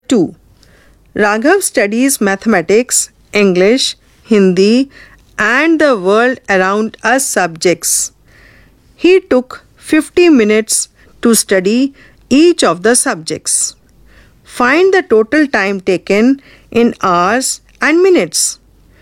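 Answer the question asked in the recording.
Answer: 3 hours 20 minutes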